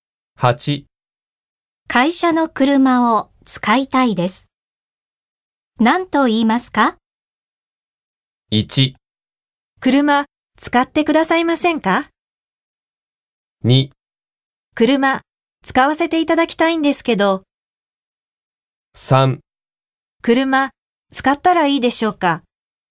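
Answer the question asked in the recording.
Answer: 2: 車使わせていただきたいんですけど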